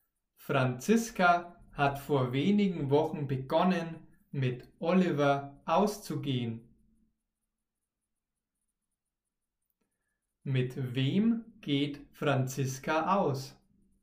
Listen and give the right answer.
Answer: Mit Oliver. Franziska geht mit Oliver aus.